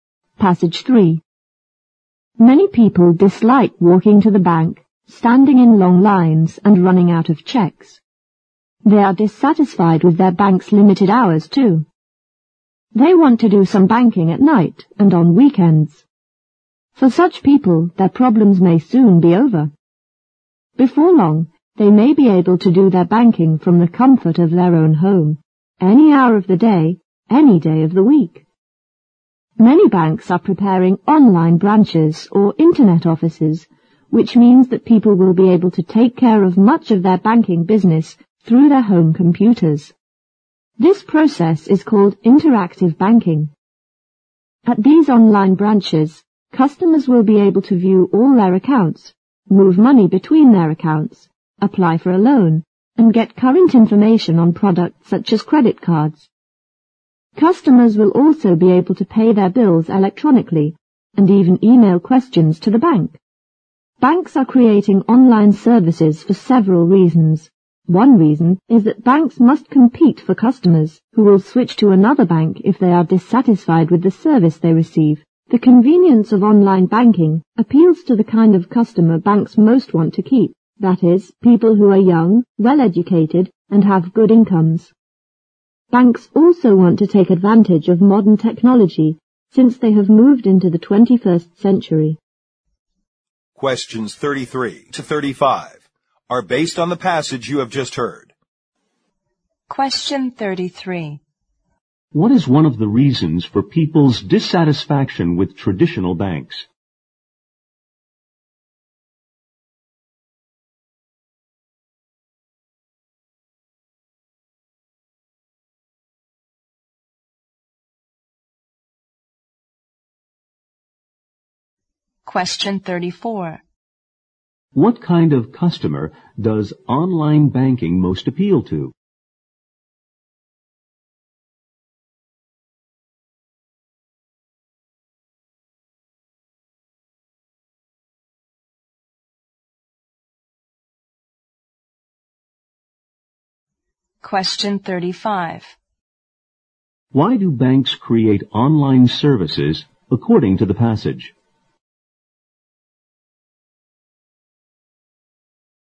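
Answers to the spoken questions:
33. Their limited hours (and long lines)
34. Young, well-educated people with good incomes
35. To compete for customers (and use modern technology)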